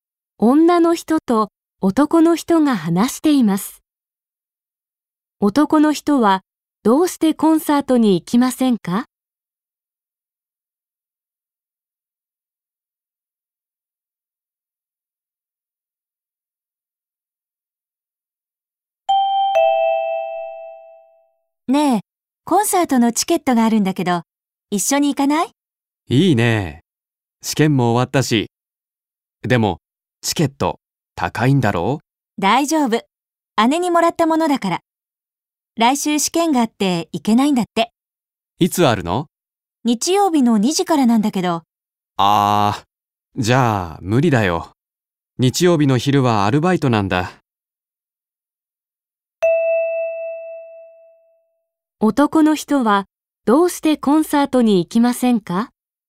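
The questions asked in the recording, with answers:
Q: 男の人は、どうしてコンサートに行きませんか?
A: 日曜日の昼はアルバイトがあるから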